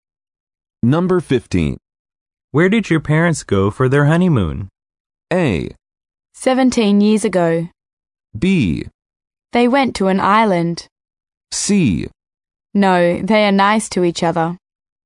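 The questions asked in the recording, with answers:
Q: Where did your parents go for their honeymoon?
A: B: They went to an island.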